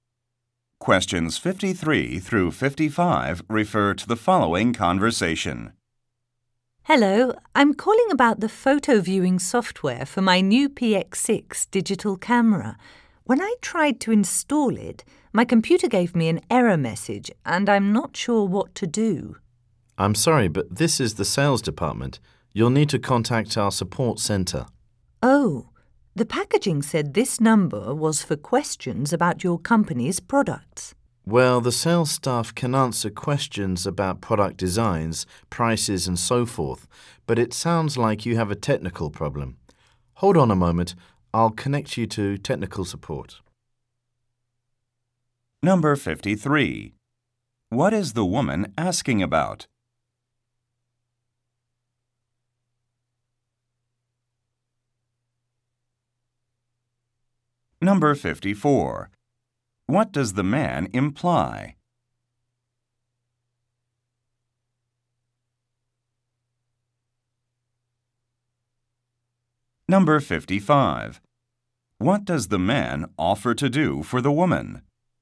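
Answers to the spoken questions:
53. Installing photo viewing software for her camera
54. She called the wrong department
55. Connect her to technical support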